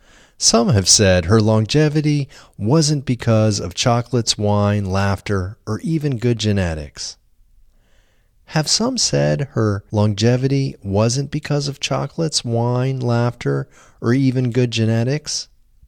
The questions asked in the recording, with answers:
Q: Have some said her longevity wasn't because of chocolates, wine, laughter, or even good genetics?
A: Yes, some have said her longevity wasn't because of chocolates, wine, laughter, or even good genetics.